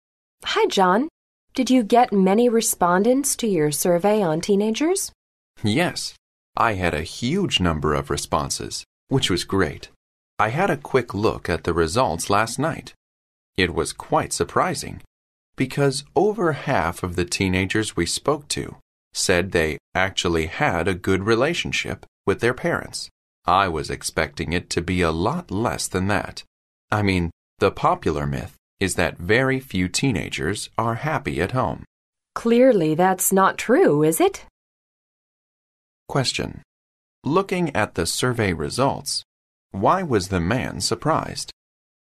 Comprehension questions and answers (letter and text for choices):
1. Looking at the survey results, why was the man surprised?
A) So many teenagers were happy at home.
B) So few teenagers got on well with their parents.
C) So many teenagers wanted to participate in the survey.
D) So many teenagers don't say the truth.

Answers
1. A) So many teenagers were happy at home.

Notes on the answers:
男士对调查所得的结果很吃惊是因为调查中有超过一半的少年与父母关系很好,而他预想的数字要比这少。

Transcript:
W: Hi John, did you get many respondents to your survey on teenagers?
M: Yes, I had a huge number of responses, which was great. I had a quick look at the results last night. It was quite surprising because over half of the teenagers we spoke to said they actually had a good relationship with their parents. I was expecting it to be a lot less than that. I mean the popular myth is that very few teenagers are happy at home.
W: Clearly that's not true, is it?
Question: Looking at the survey results, why was the man surprised?